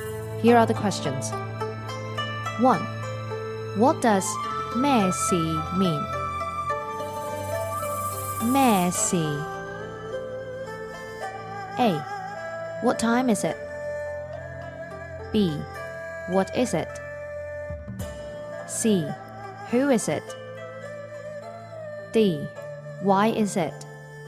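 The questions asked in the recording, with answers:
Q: What does 咩事 mean?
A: B: What is it?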